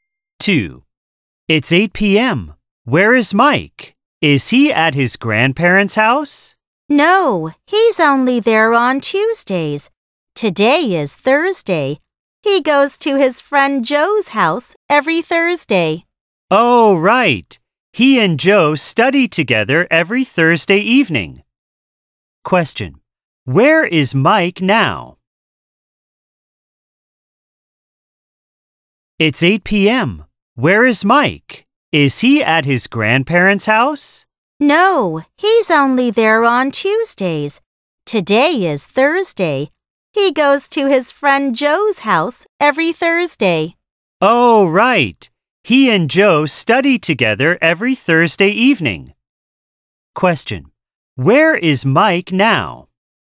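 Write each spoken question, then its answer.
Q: Where is Mike now?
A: At his friend Joe's house.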